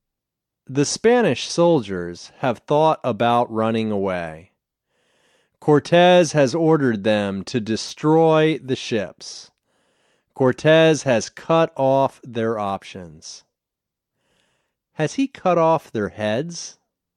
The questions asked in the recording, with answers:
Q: Has he cut off their heads?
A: No, he hasn't cut off their heads.